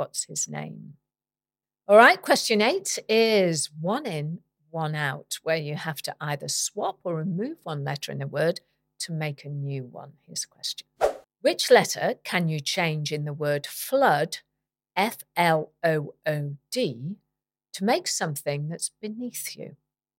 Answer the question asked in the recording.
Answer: change the D in flood to an R and you have the word floor